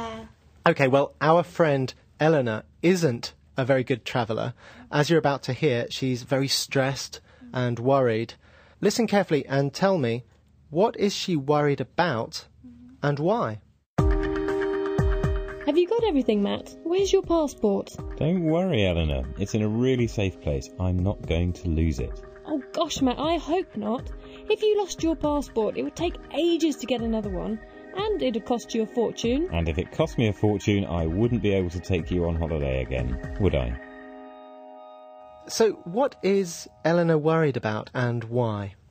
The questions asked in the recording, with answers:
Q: So what is Eleanor worried about and why?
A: Eleanor's worried about Matt losing his passport. She thinks it would take a lot of time and money to get a new one.